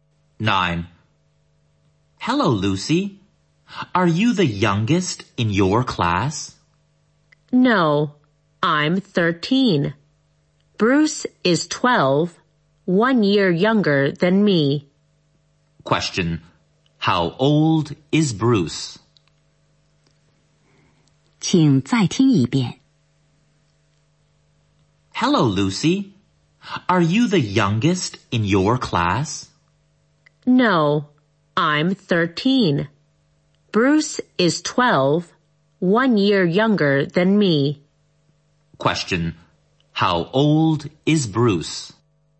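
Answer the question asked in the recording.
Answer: 12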